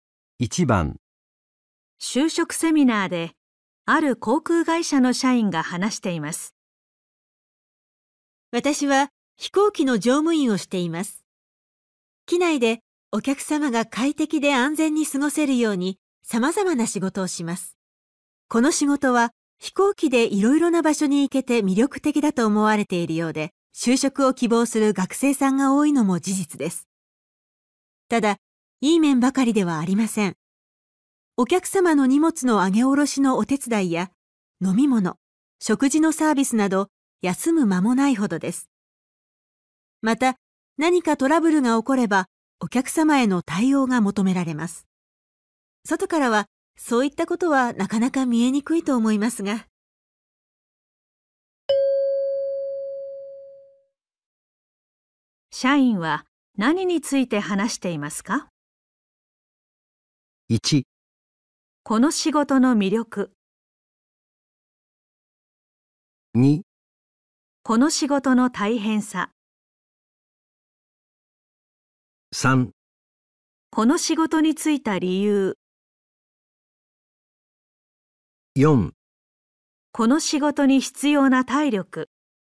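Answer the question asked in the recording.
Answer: 2: この仕事の大変さ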